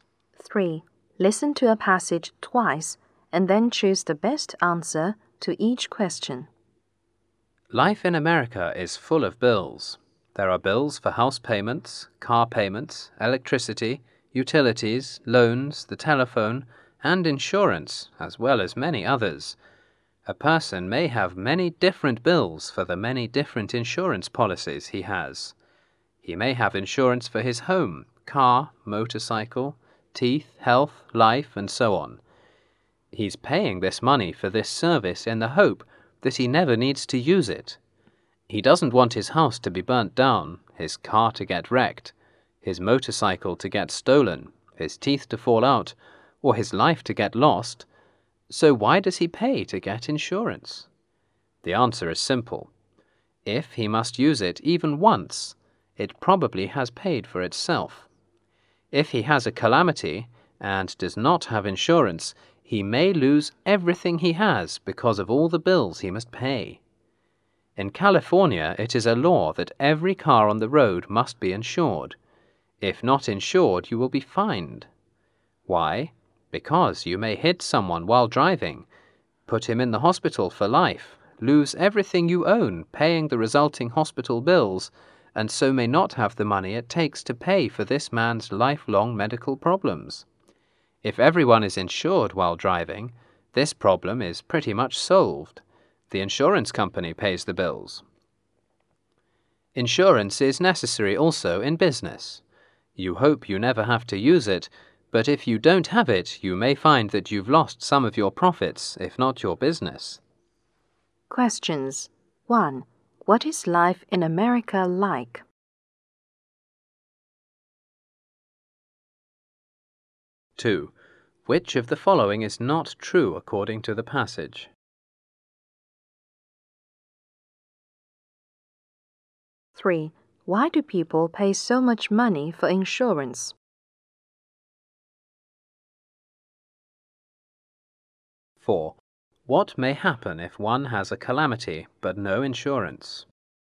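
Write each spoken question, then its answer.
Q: What is life in America like?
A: It is full of bills.

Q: What may happen if one has a calamity but no insurance?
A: He may lose everything he has because of all the bills he must pay.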